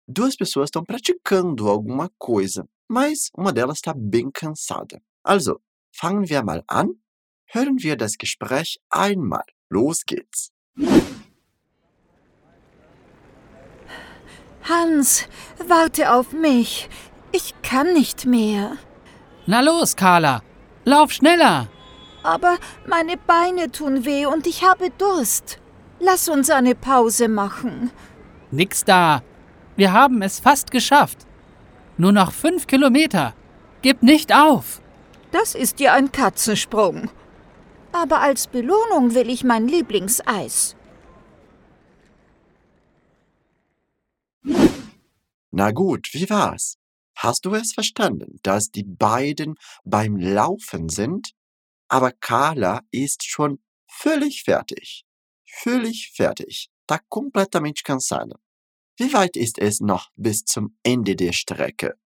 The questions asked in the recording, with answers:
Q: Wie weit ist es noch bis zum Ende der Strecke?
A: Nur noch fünf Kilometer.